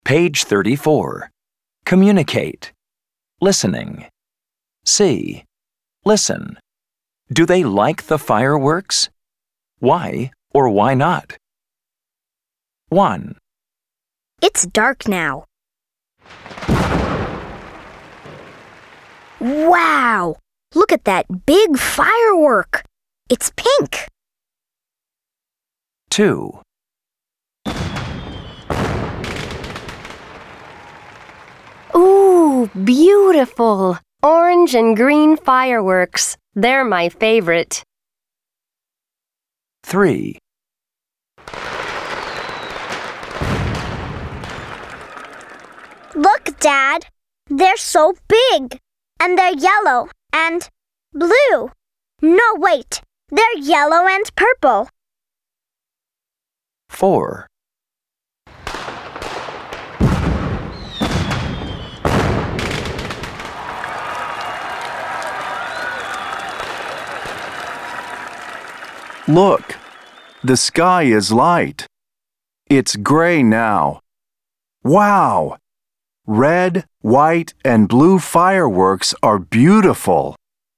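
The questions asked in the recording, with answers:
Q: Do they like the fireworks?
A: Yes, orange and green fireworks are their favorite.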